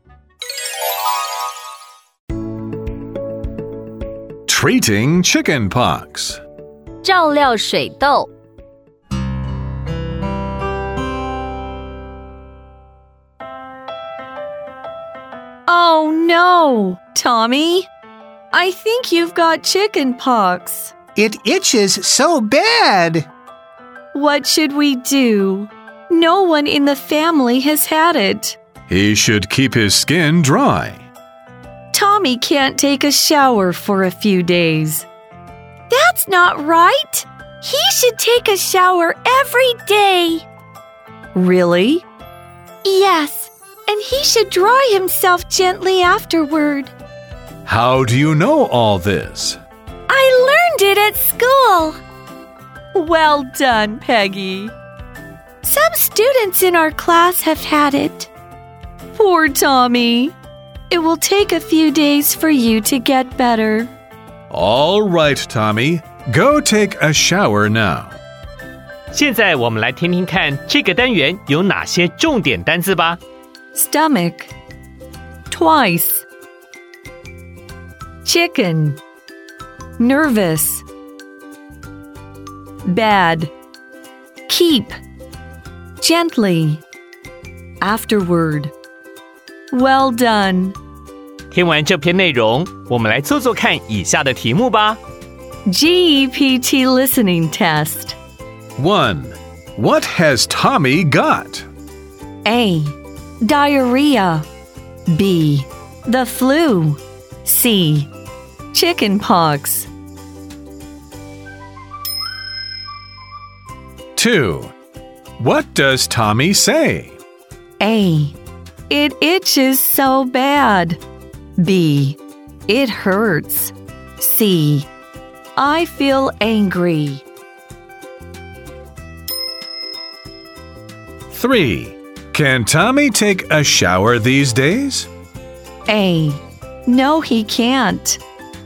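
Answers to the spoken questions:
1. C: Chicken pox.
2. A: It itches so bad.
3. B: Yes, he can.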